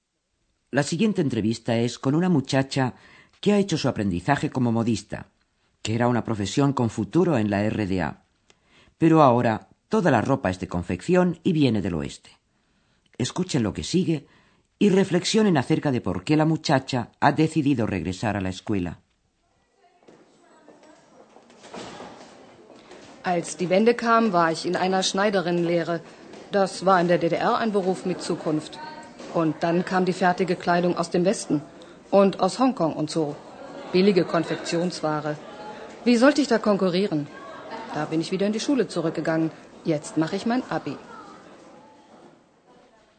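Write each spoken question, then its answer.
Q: reflexionen acerca de por qué la muchacha ha decidido regresar a la escuela.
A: Porque no podía competir con la ropa de confección barata del oeste y de Hong Kong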